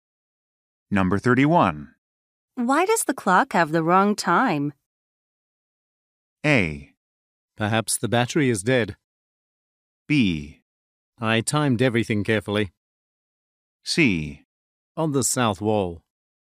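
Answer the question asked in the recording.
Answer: A: Perhaps the battery is dead.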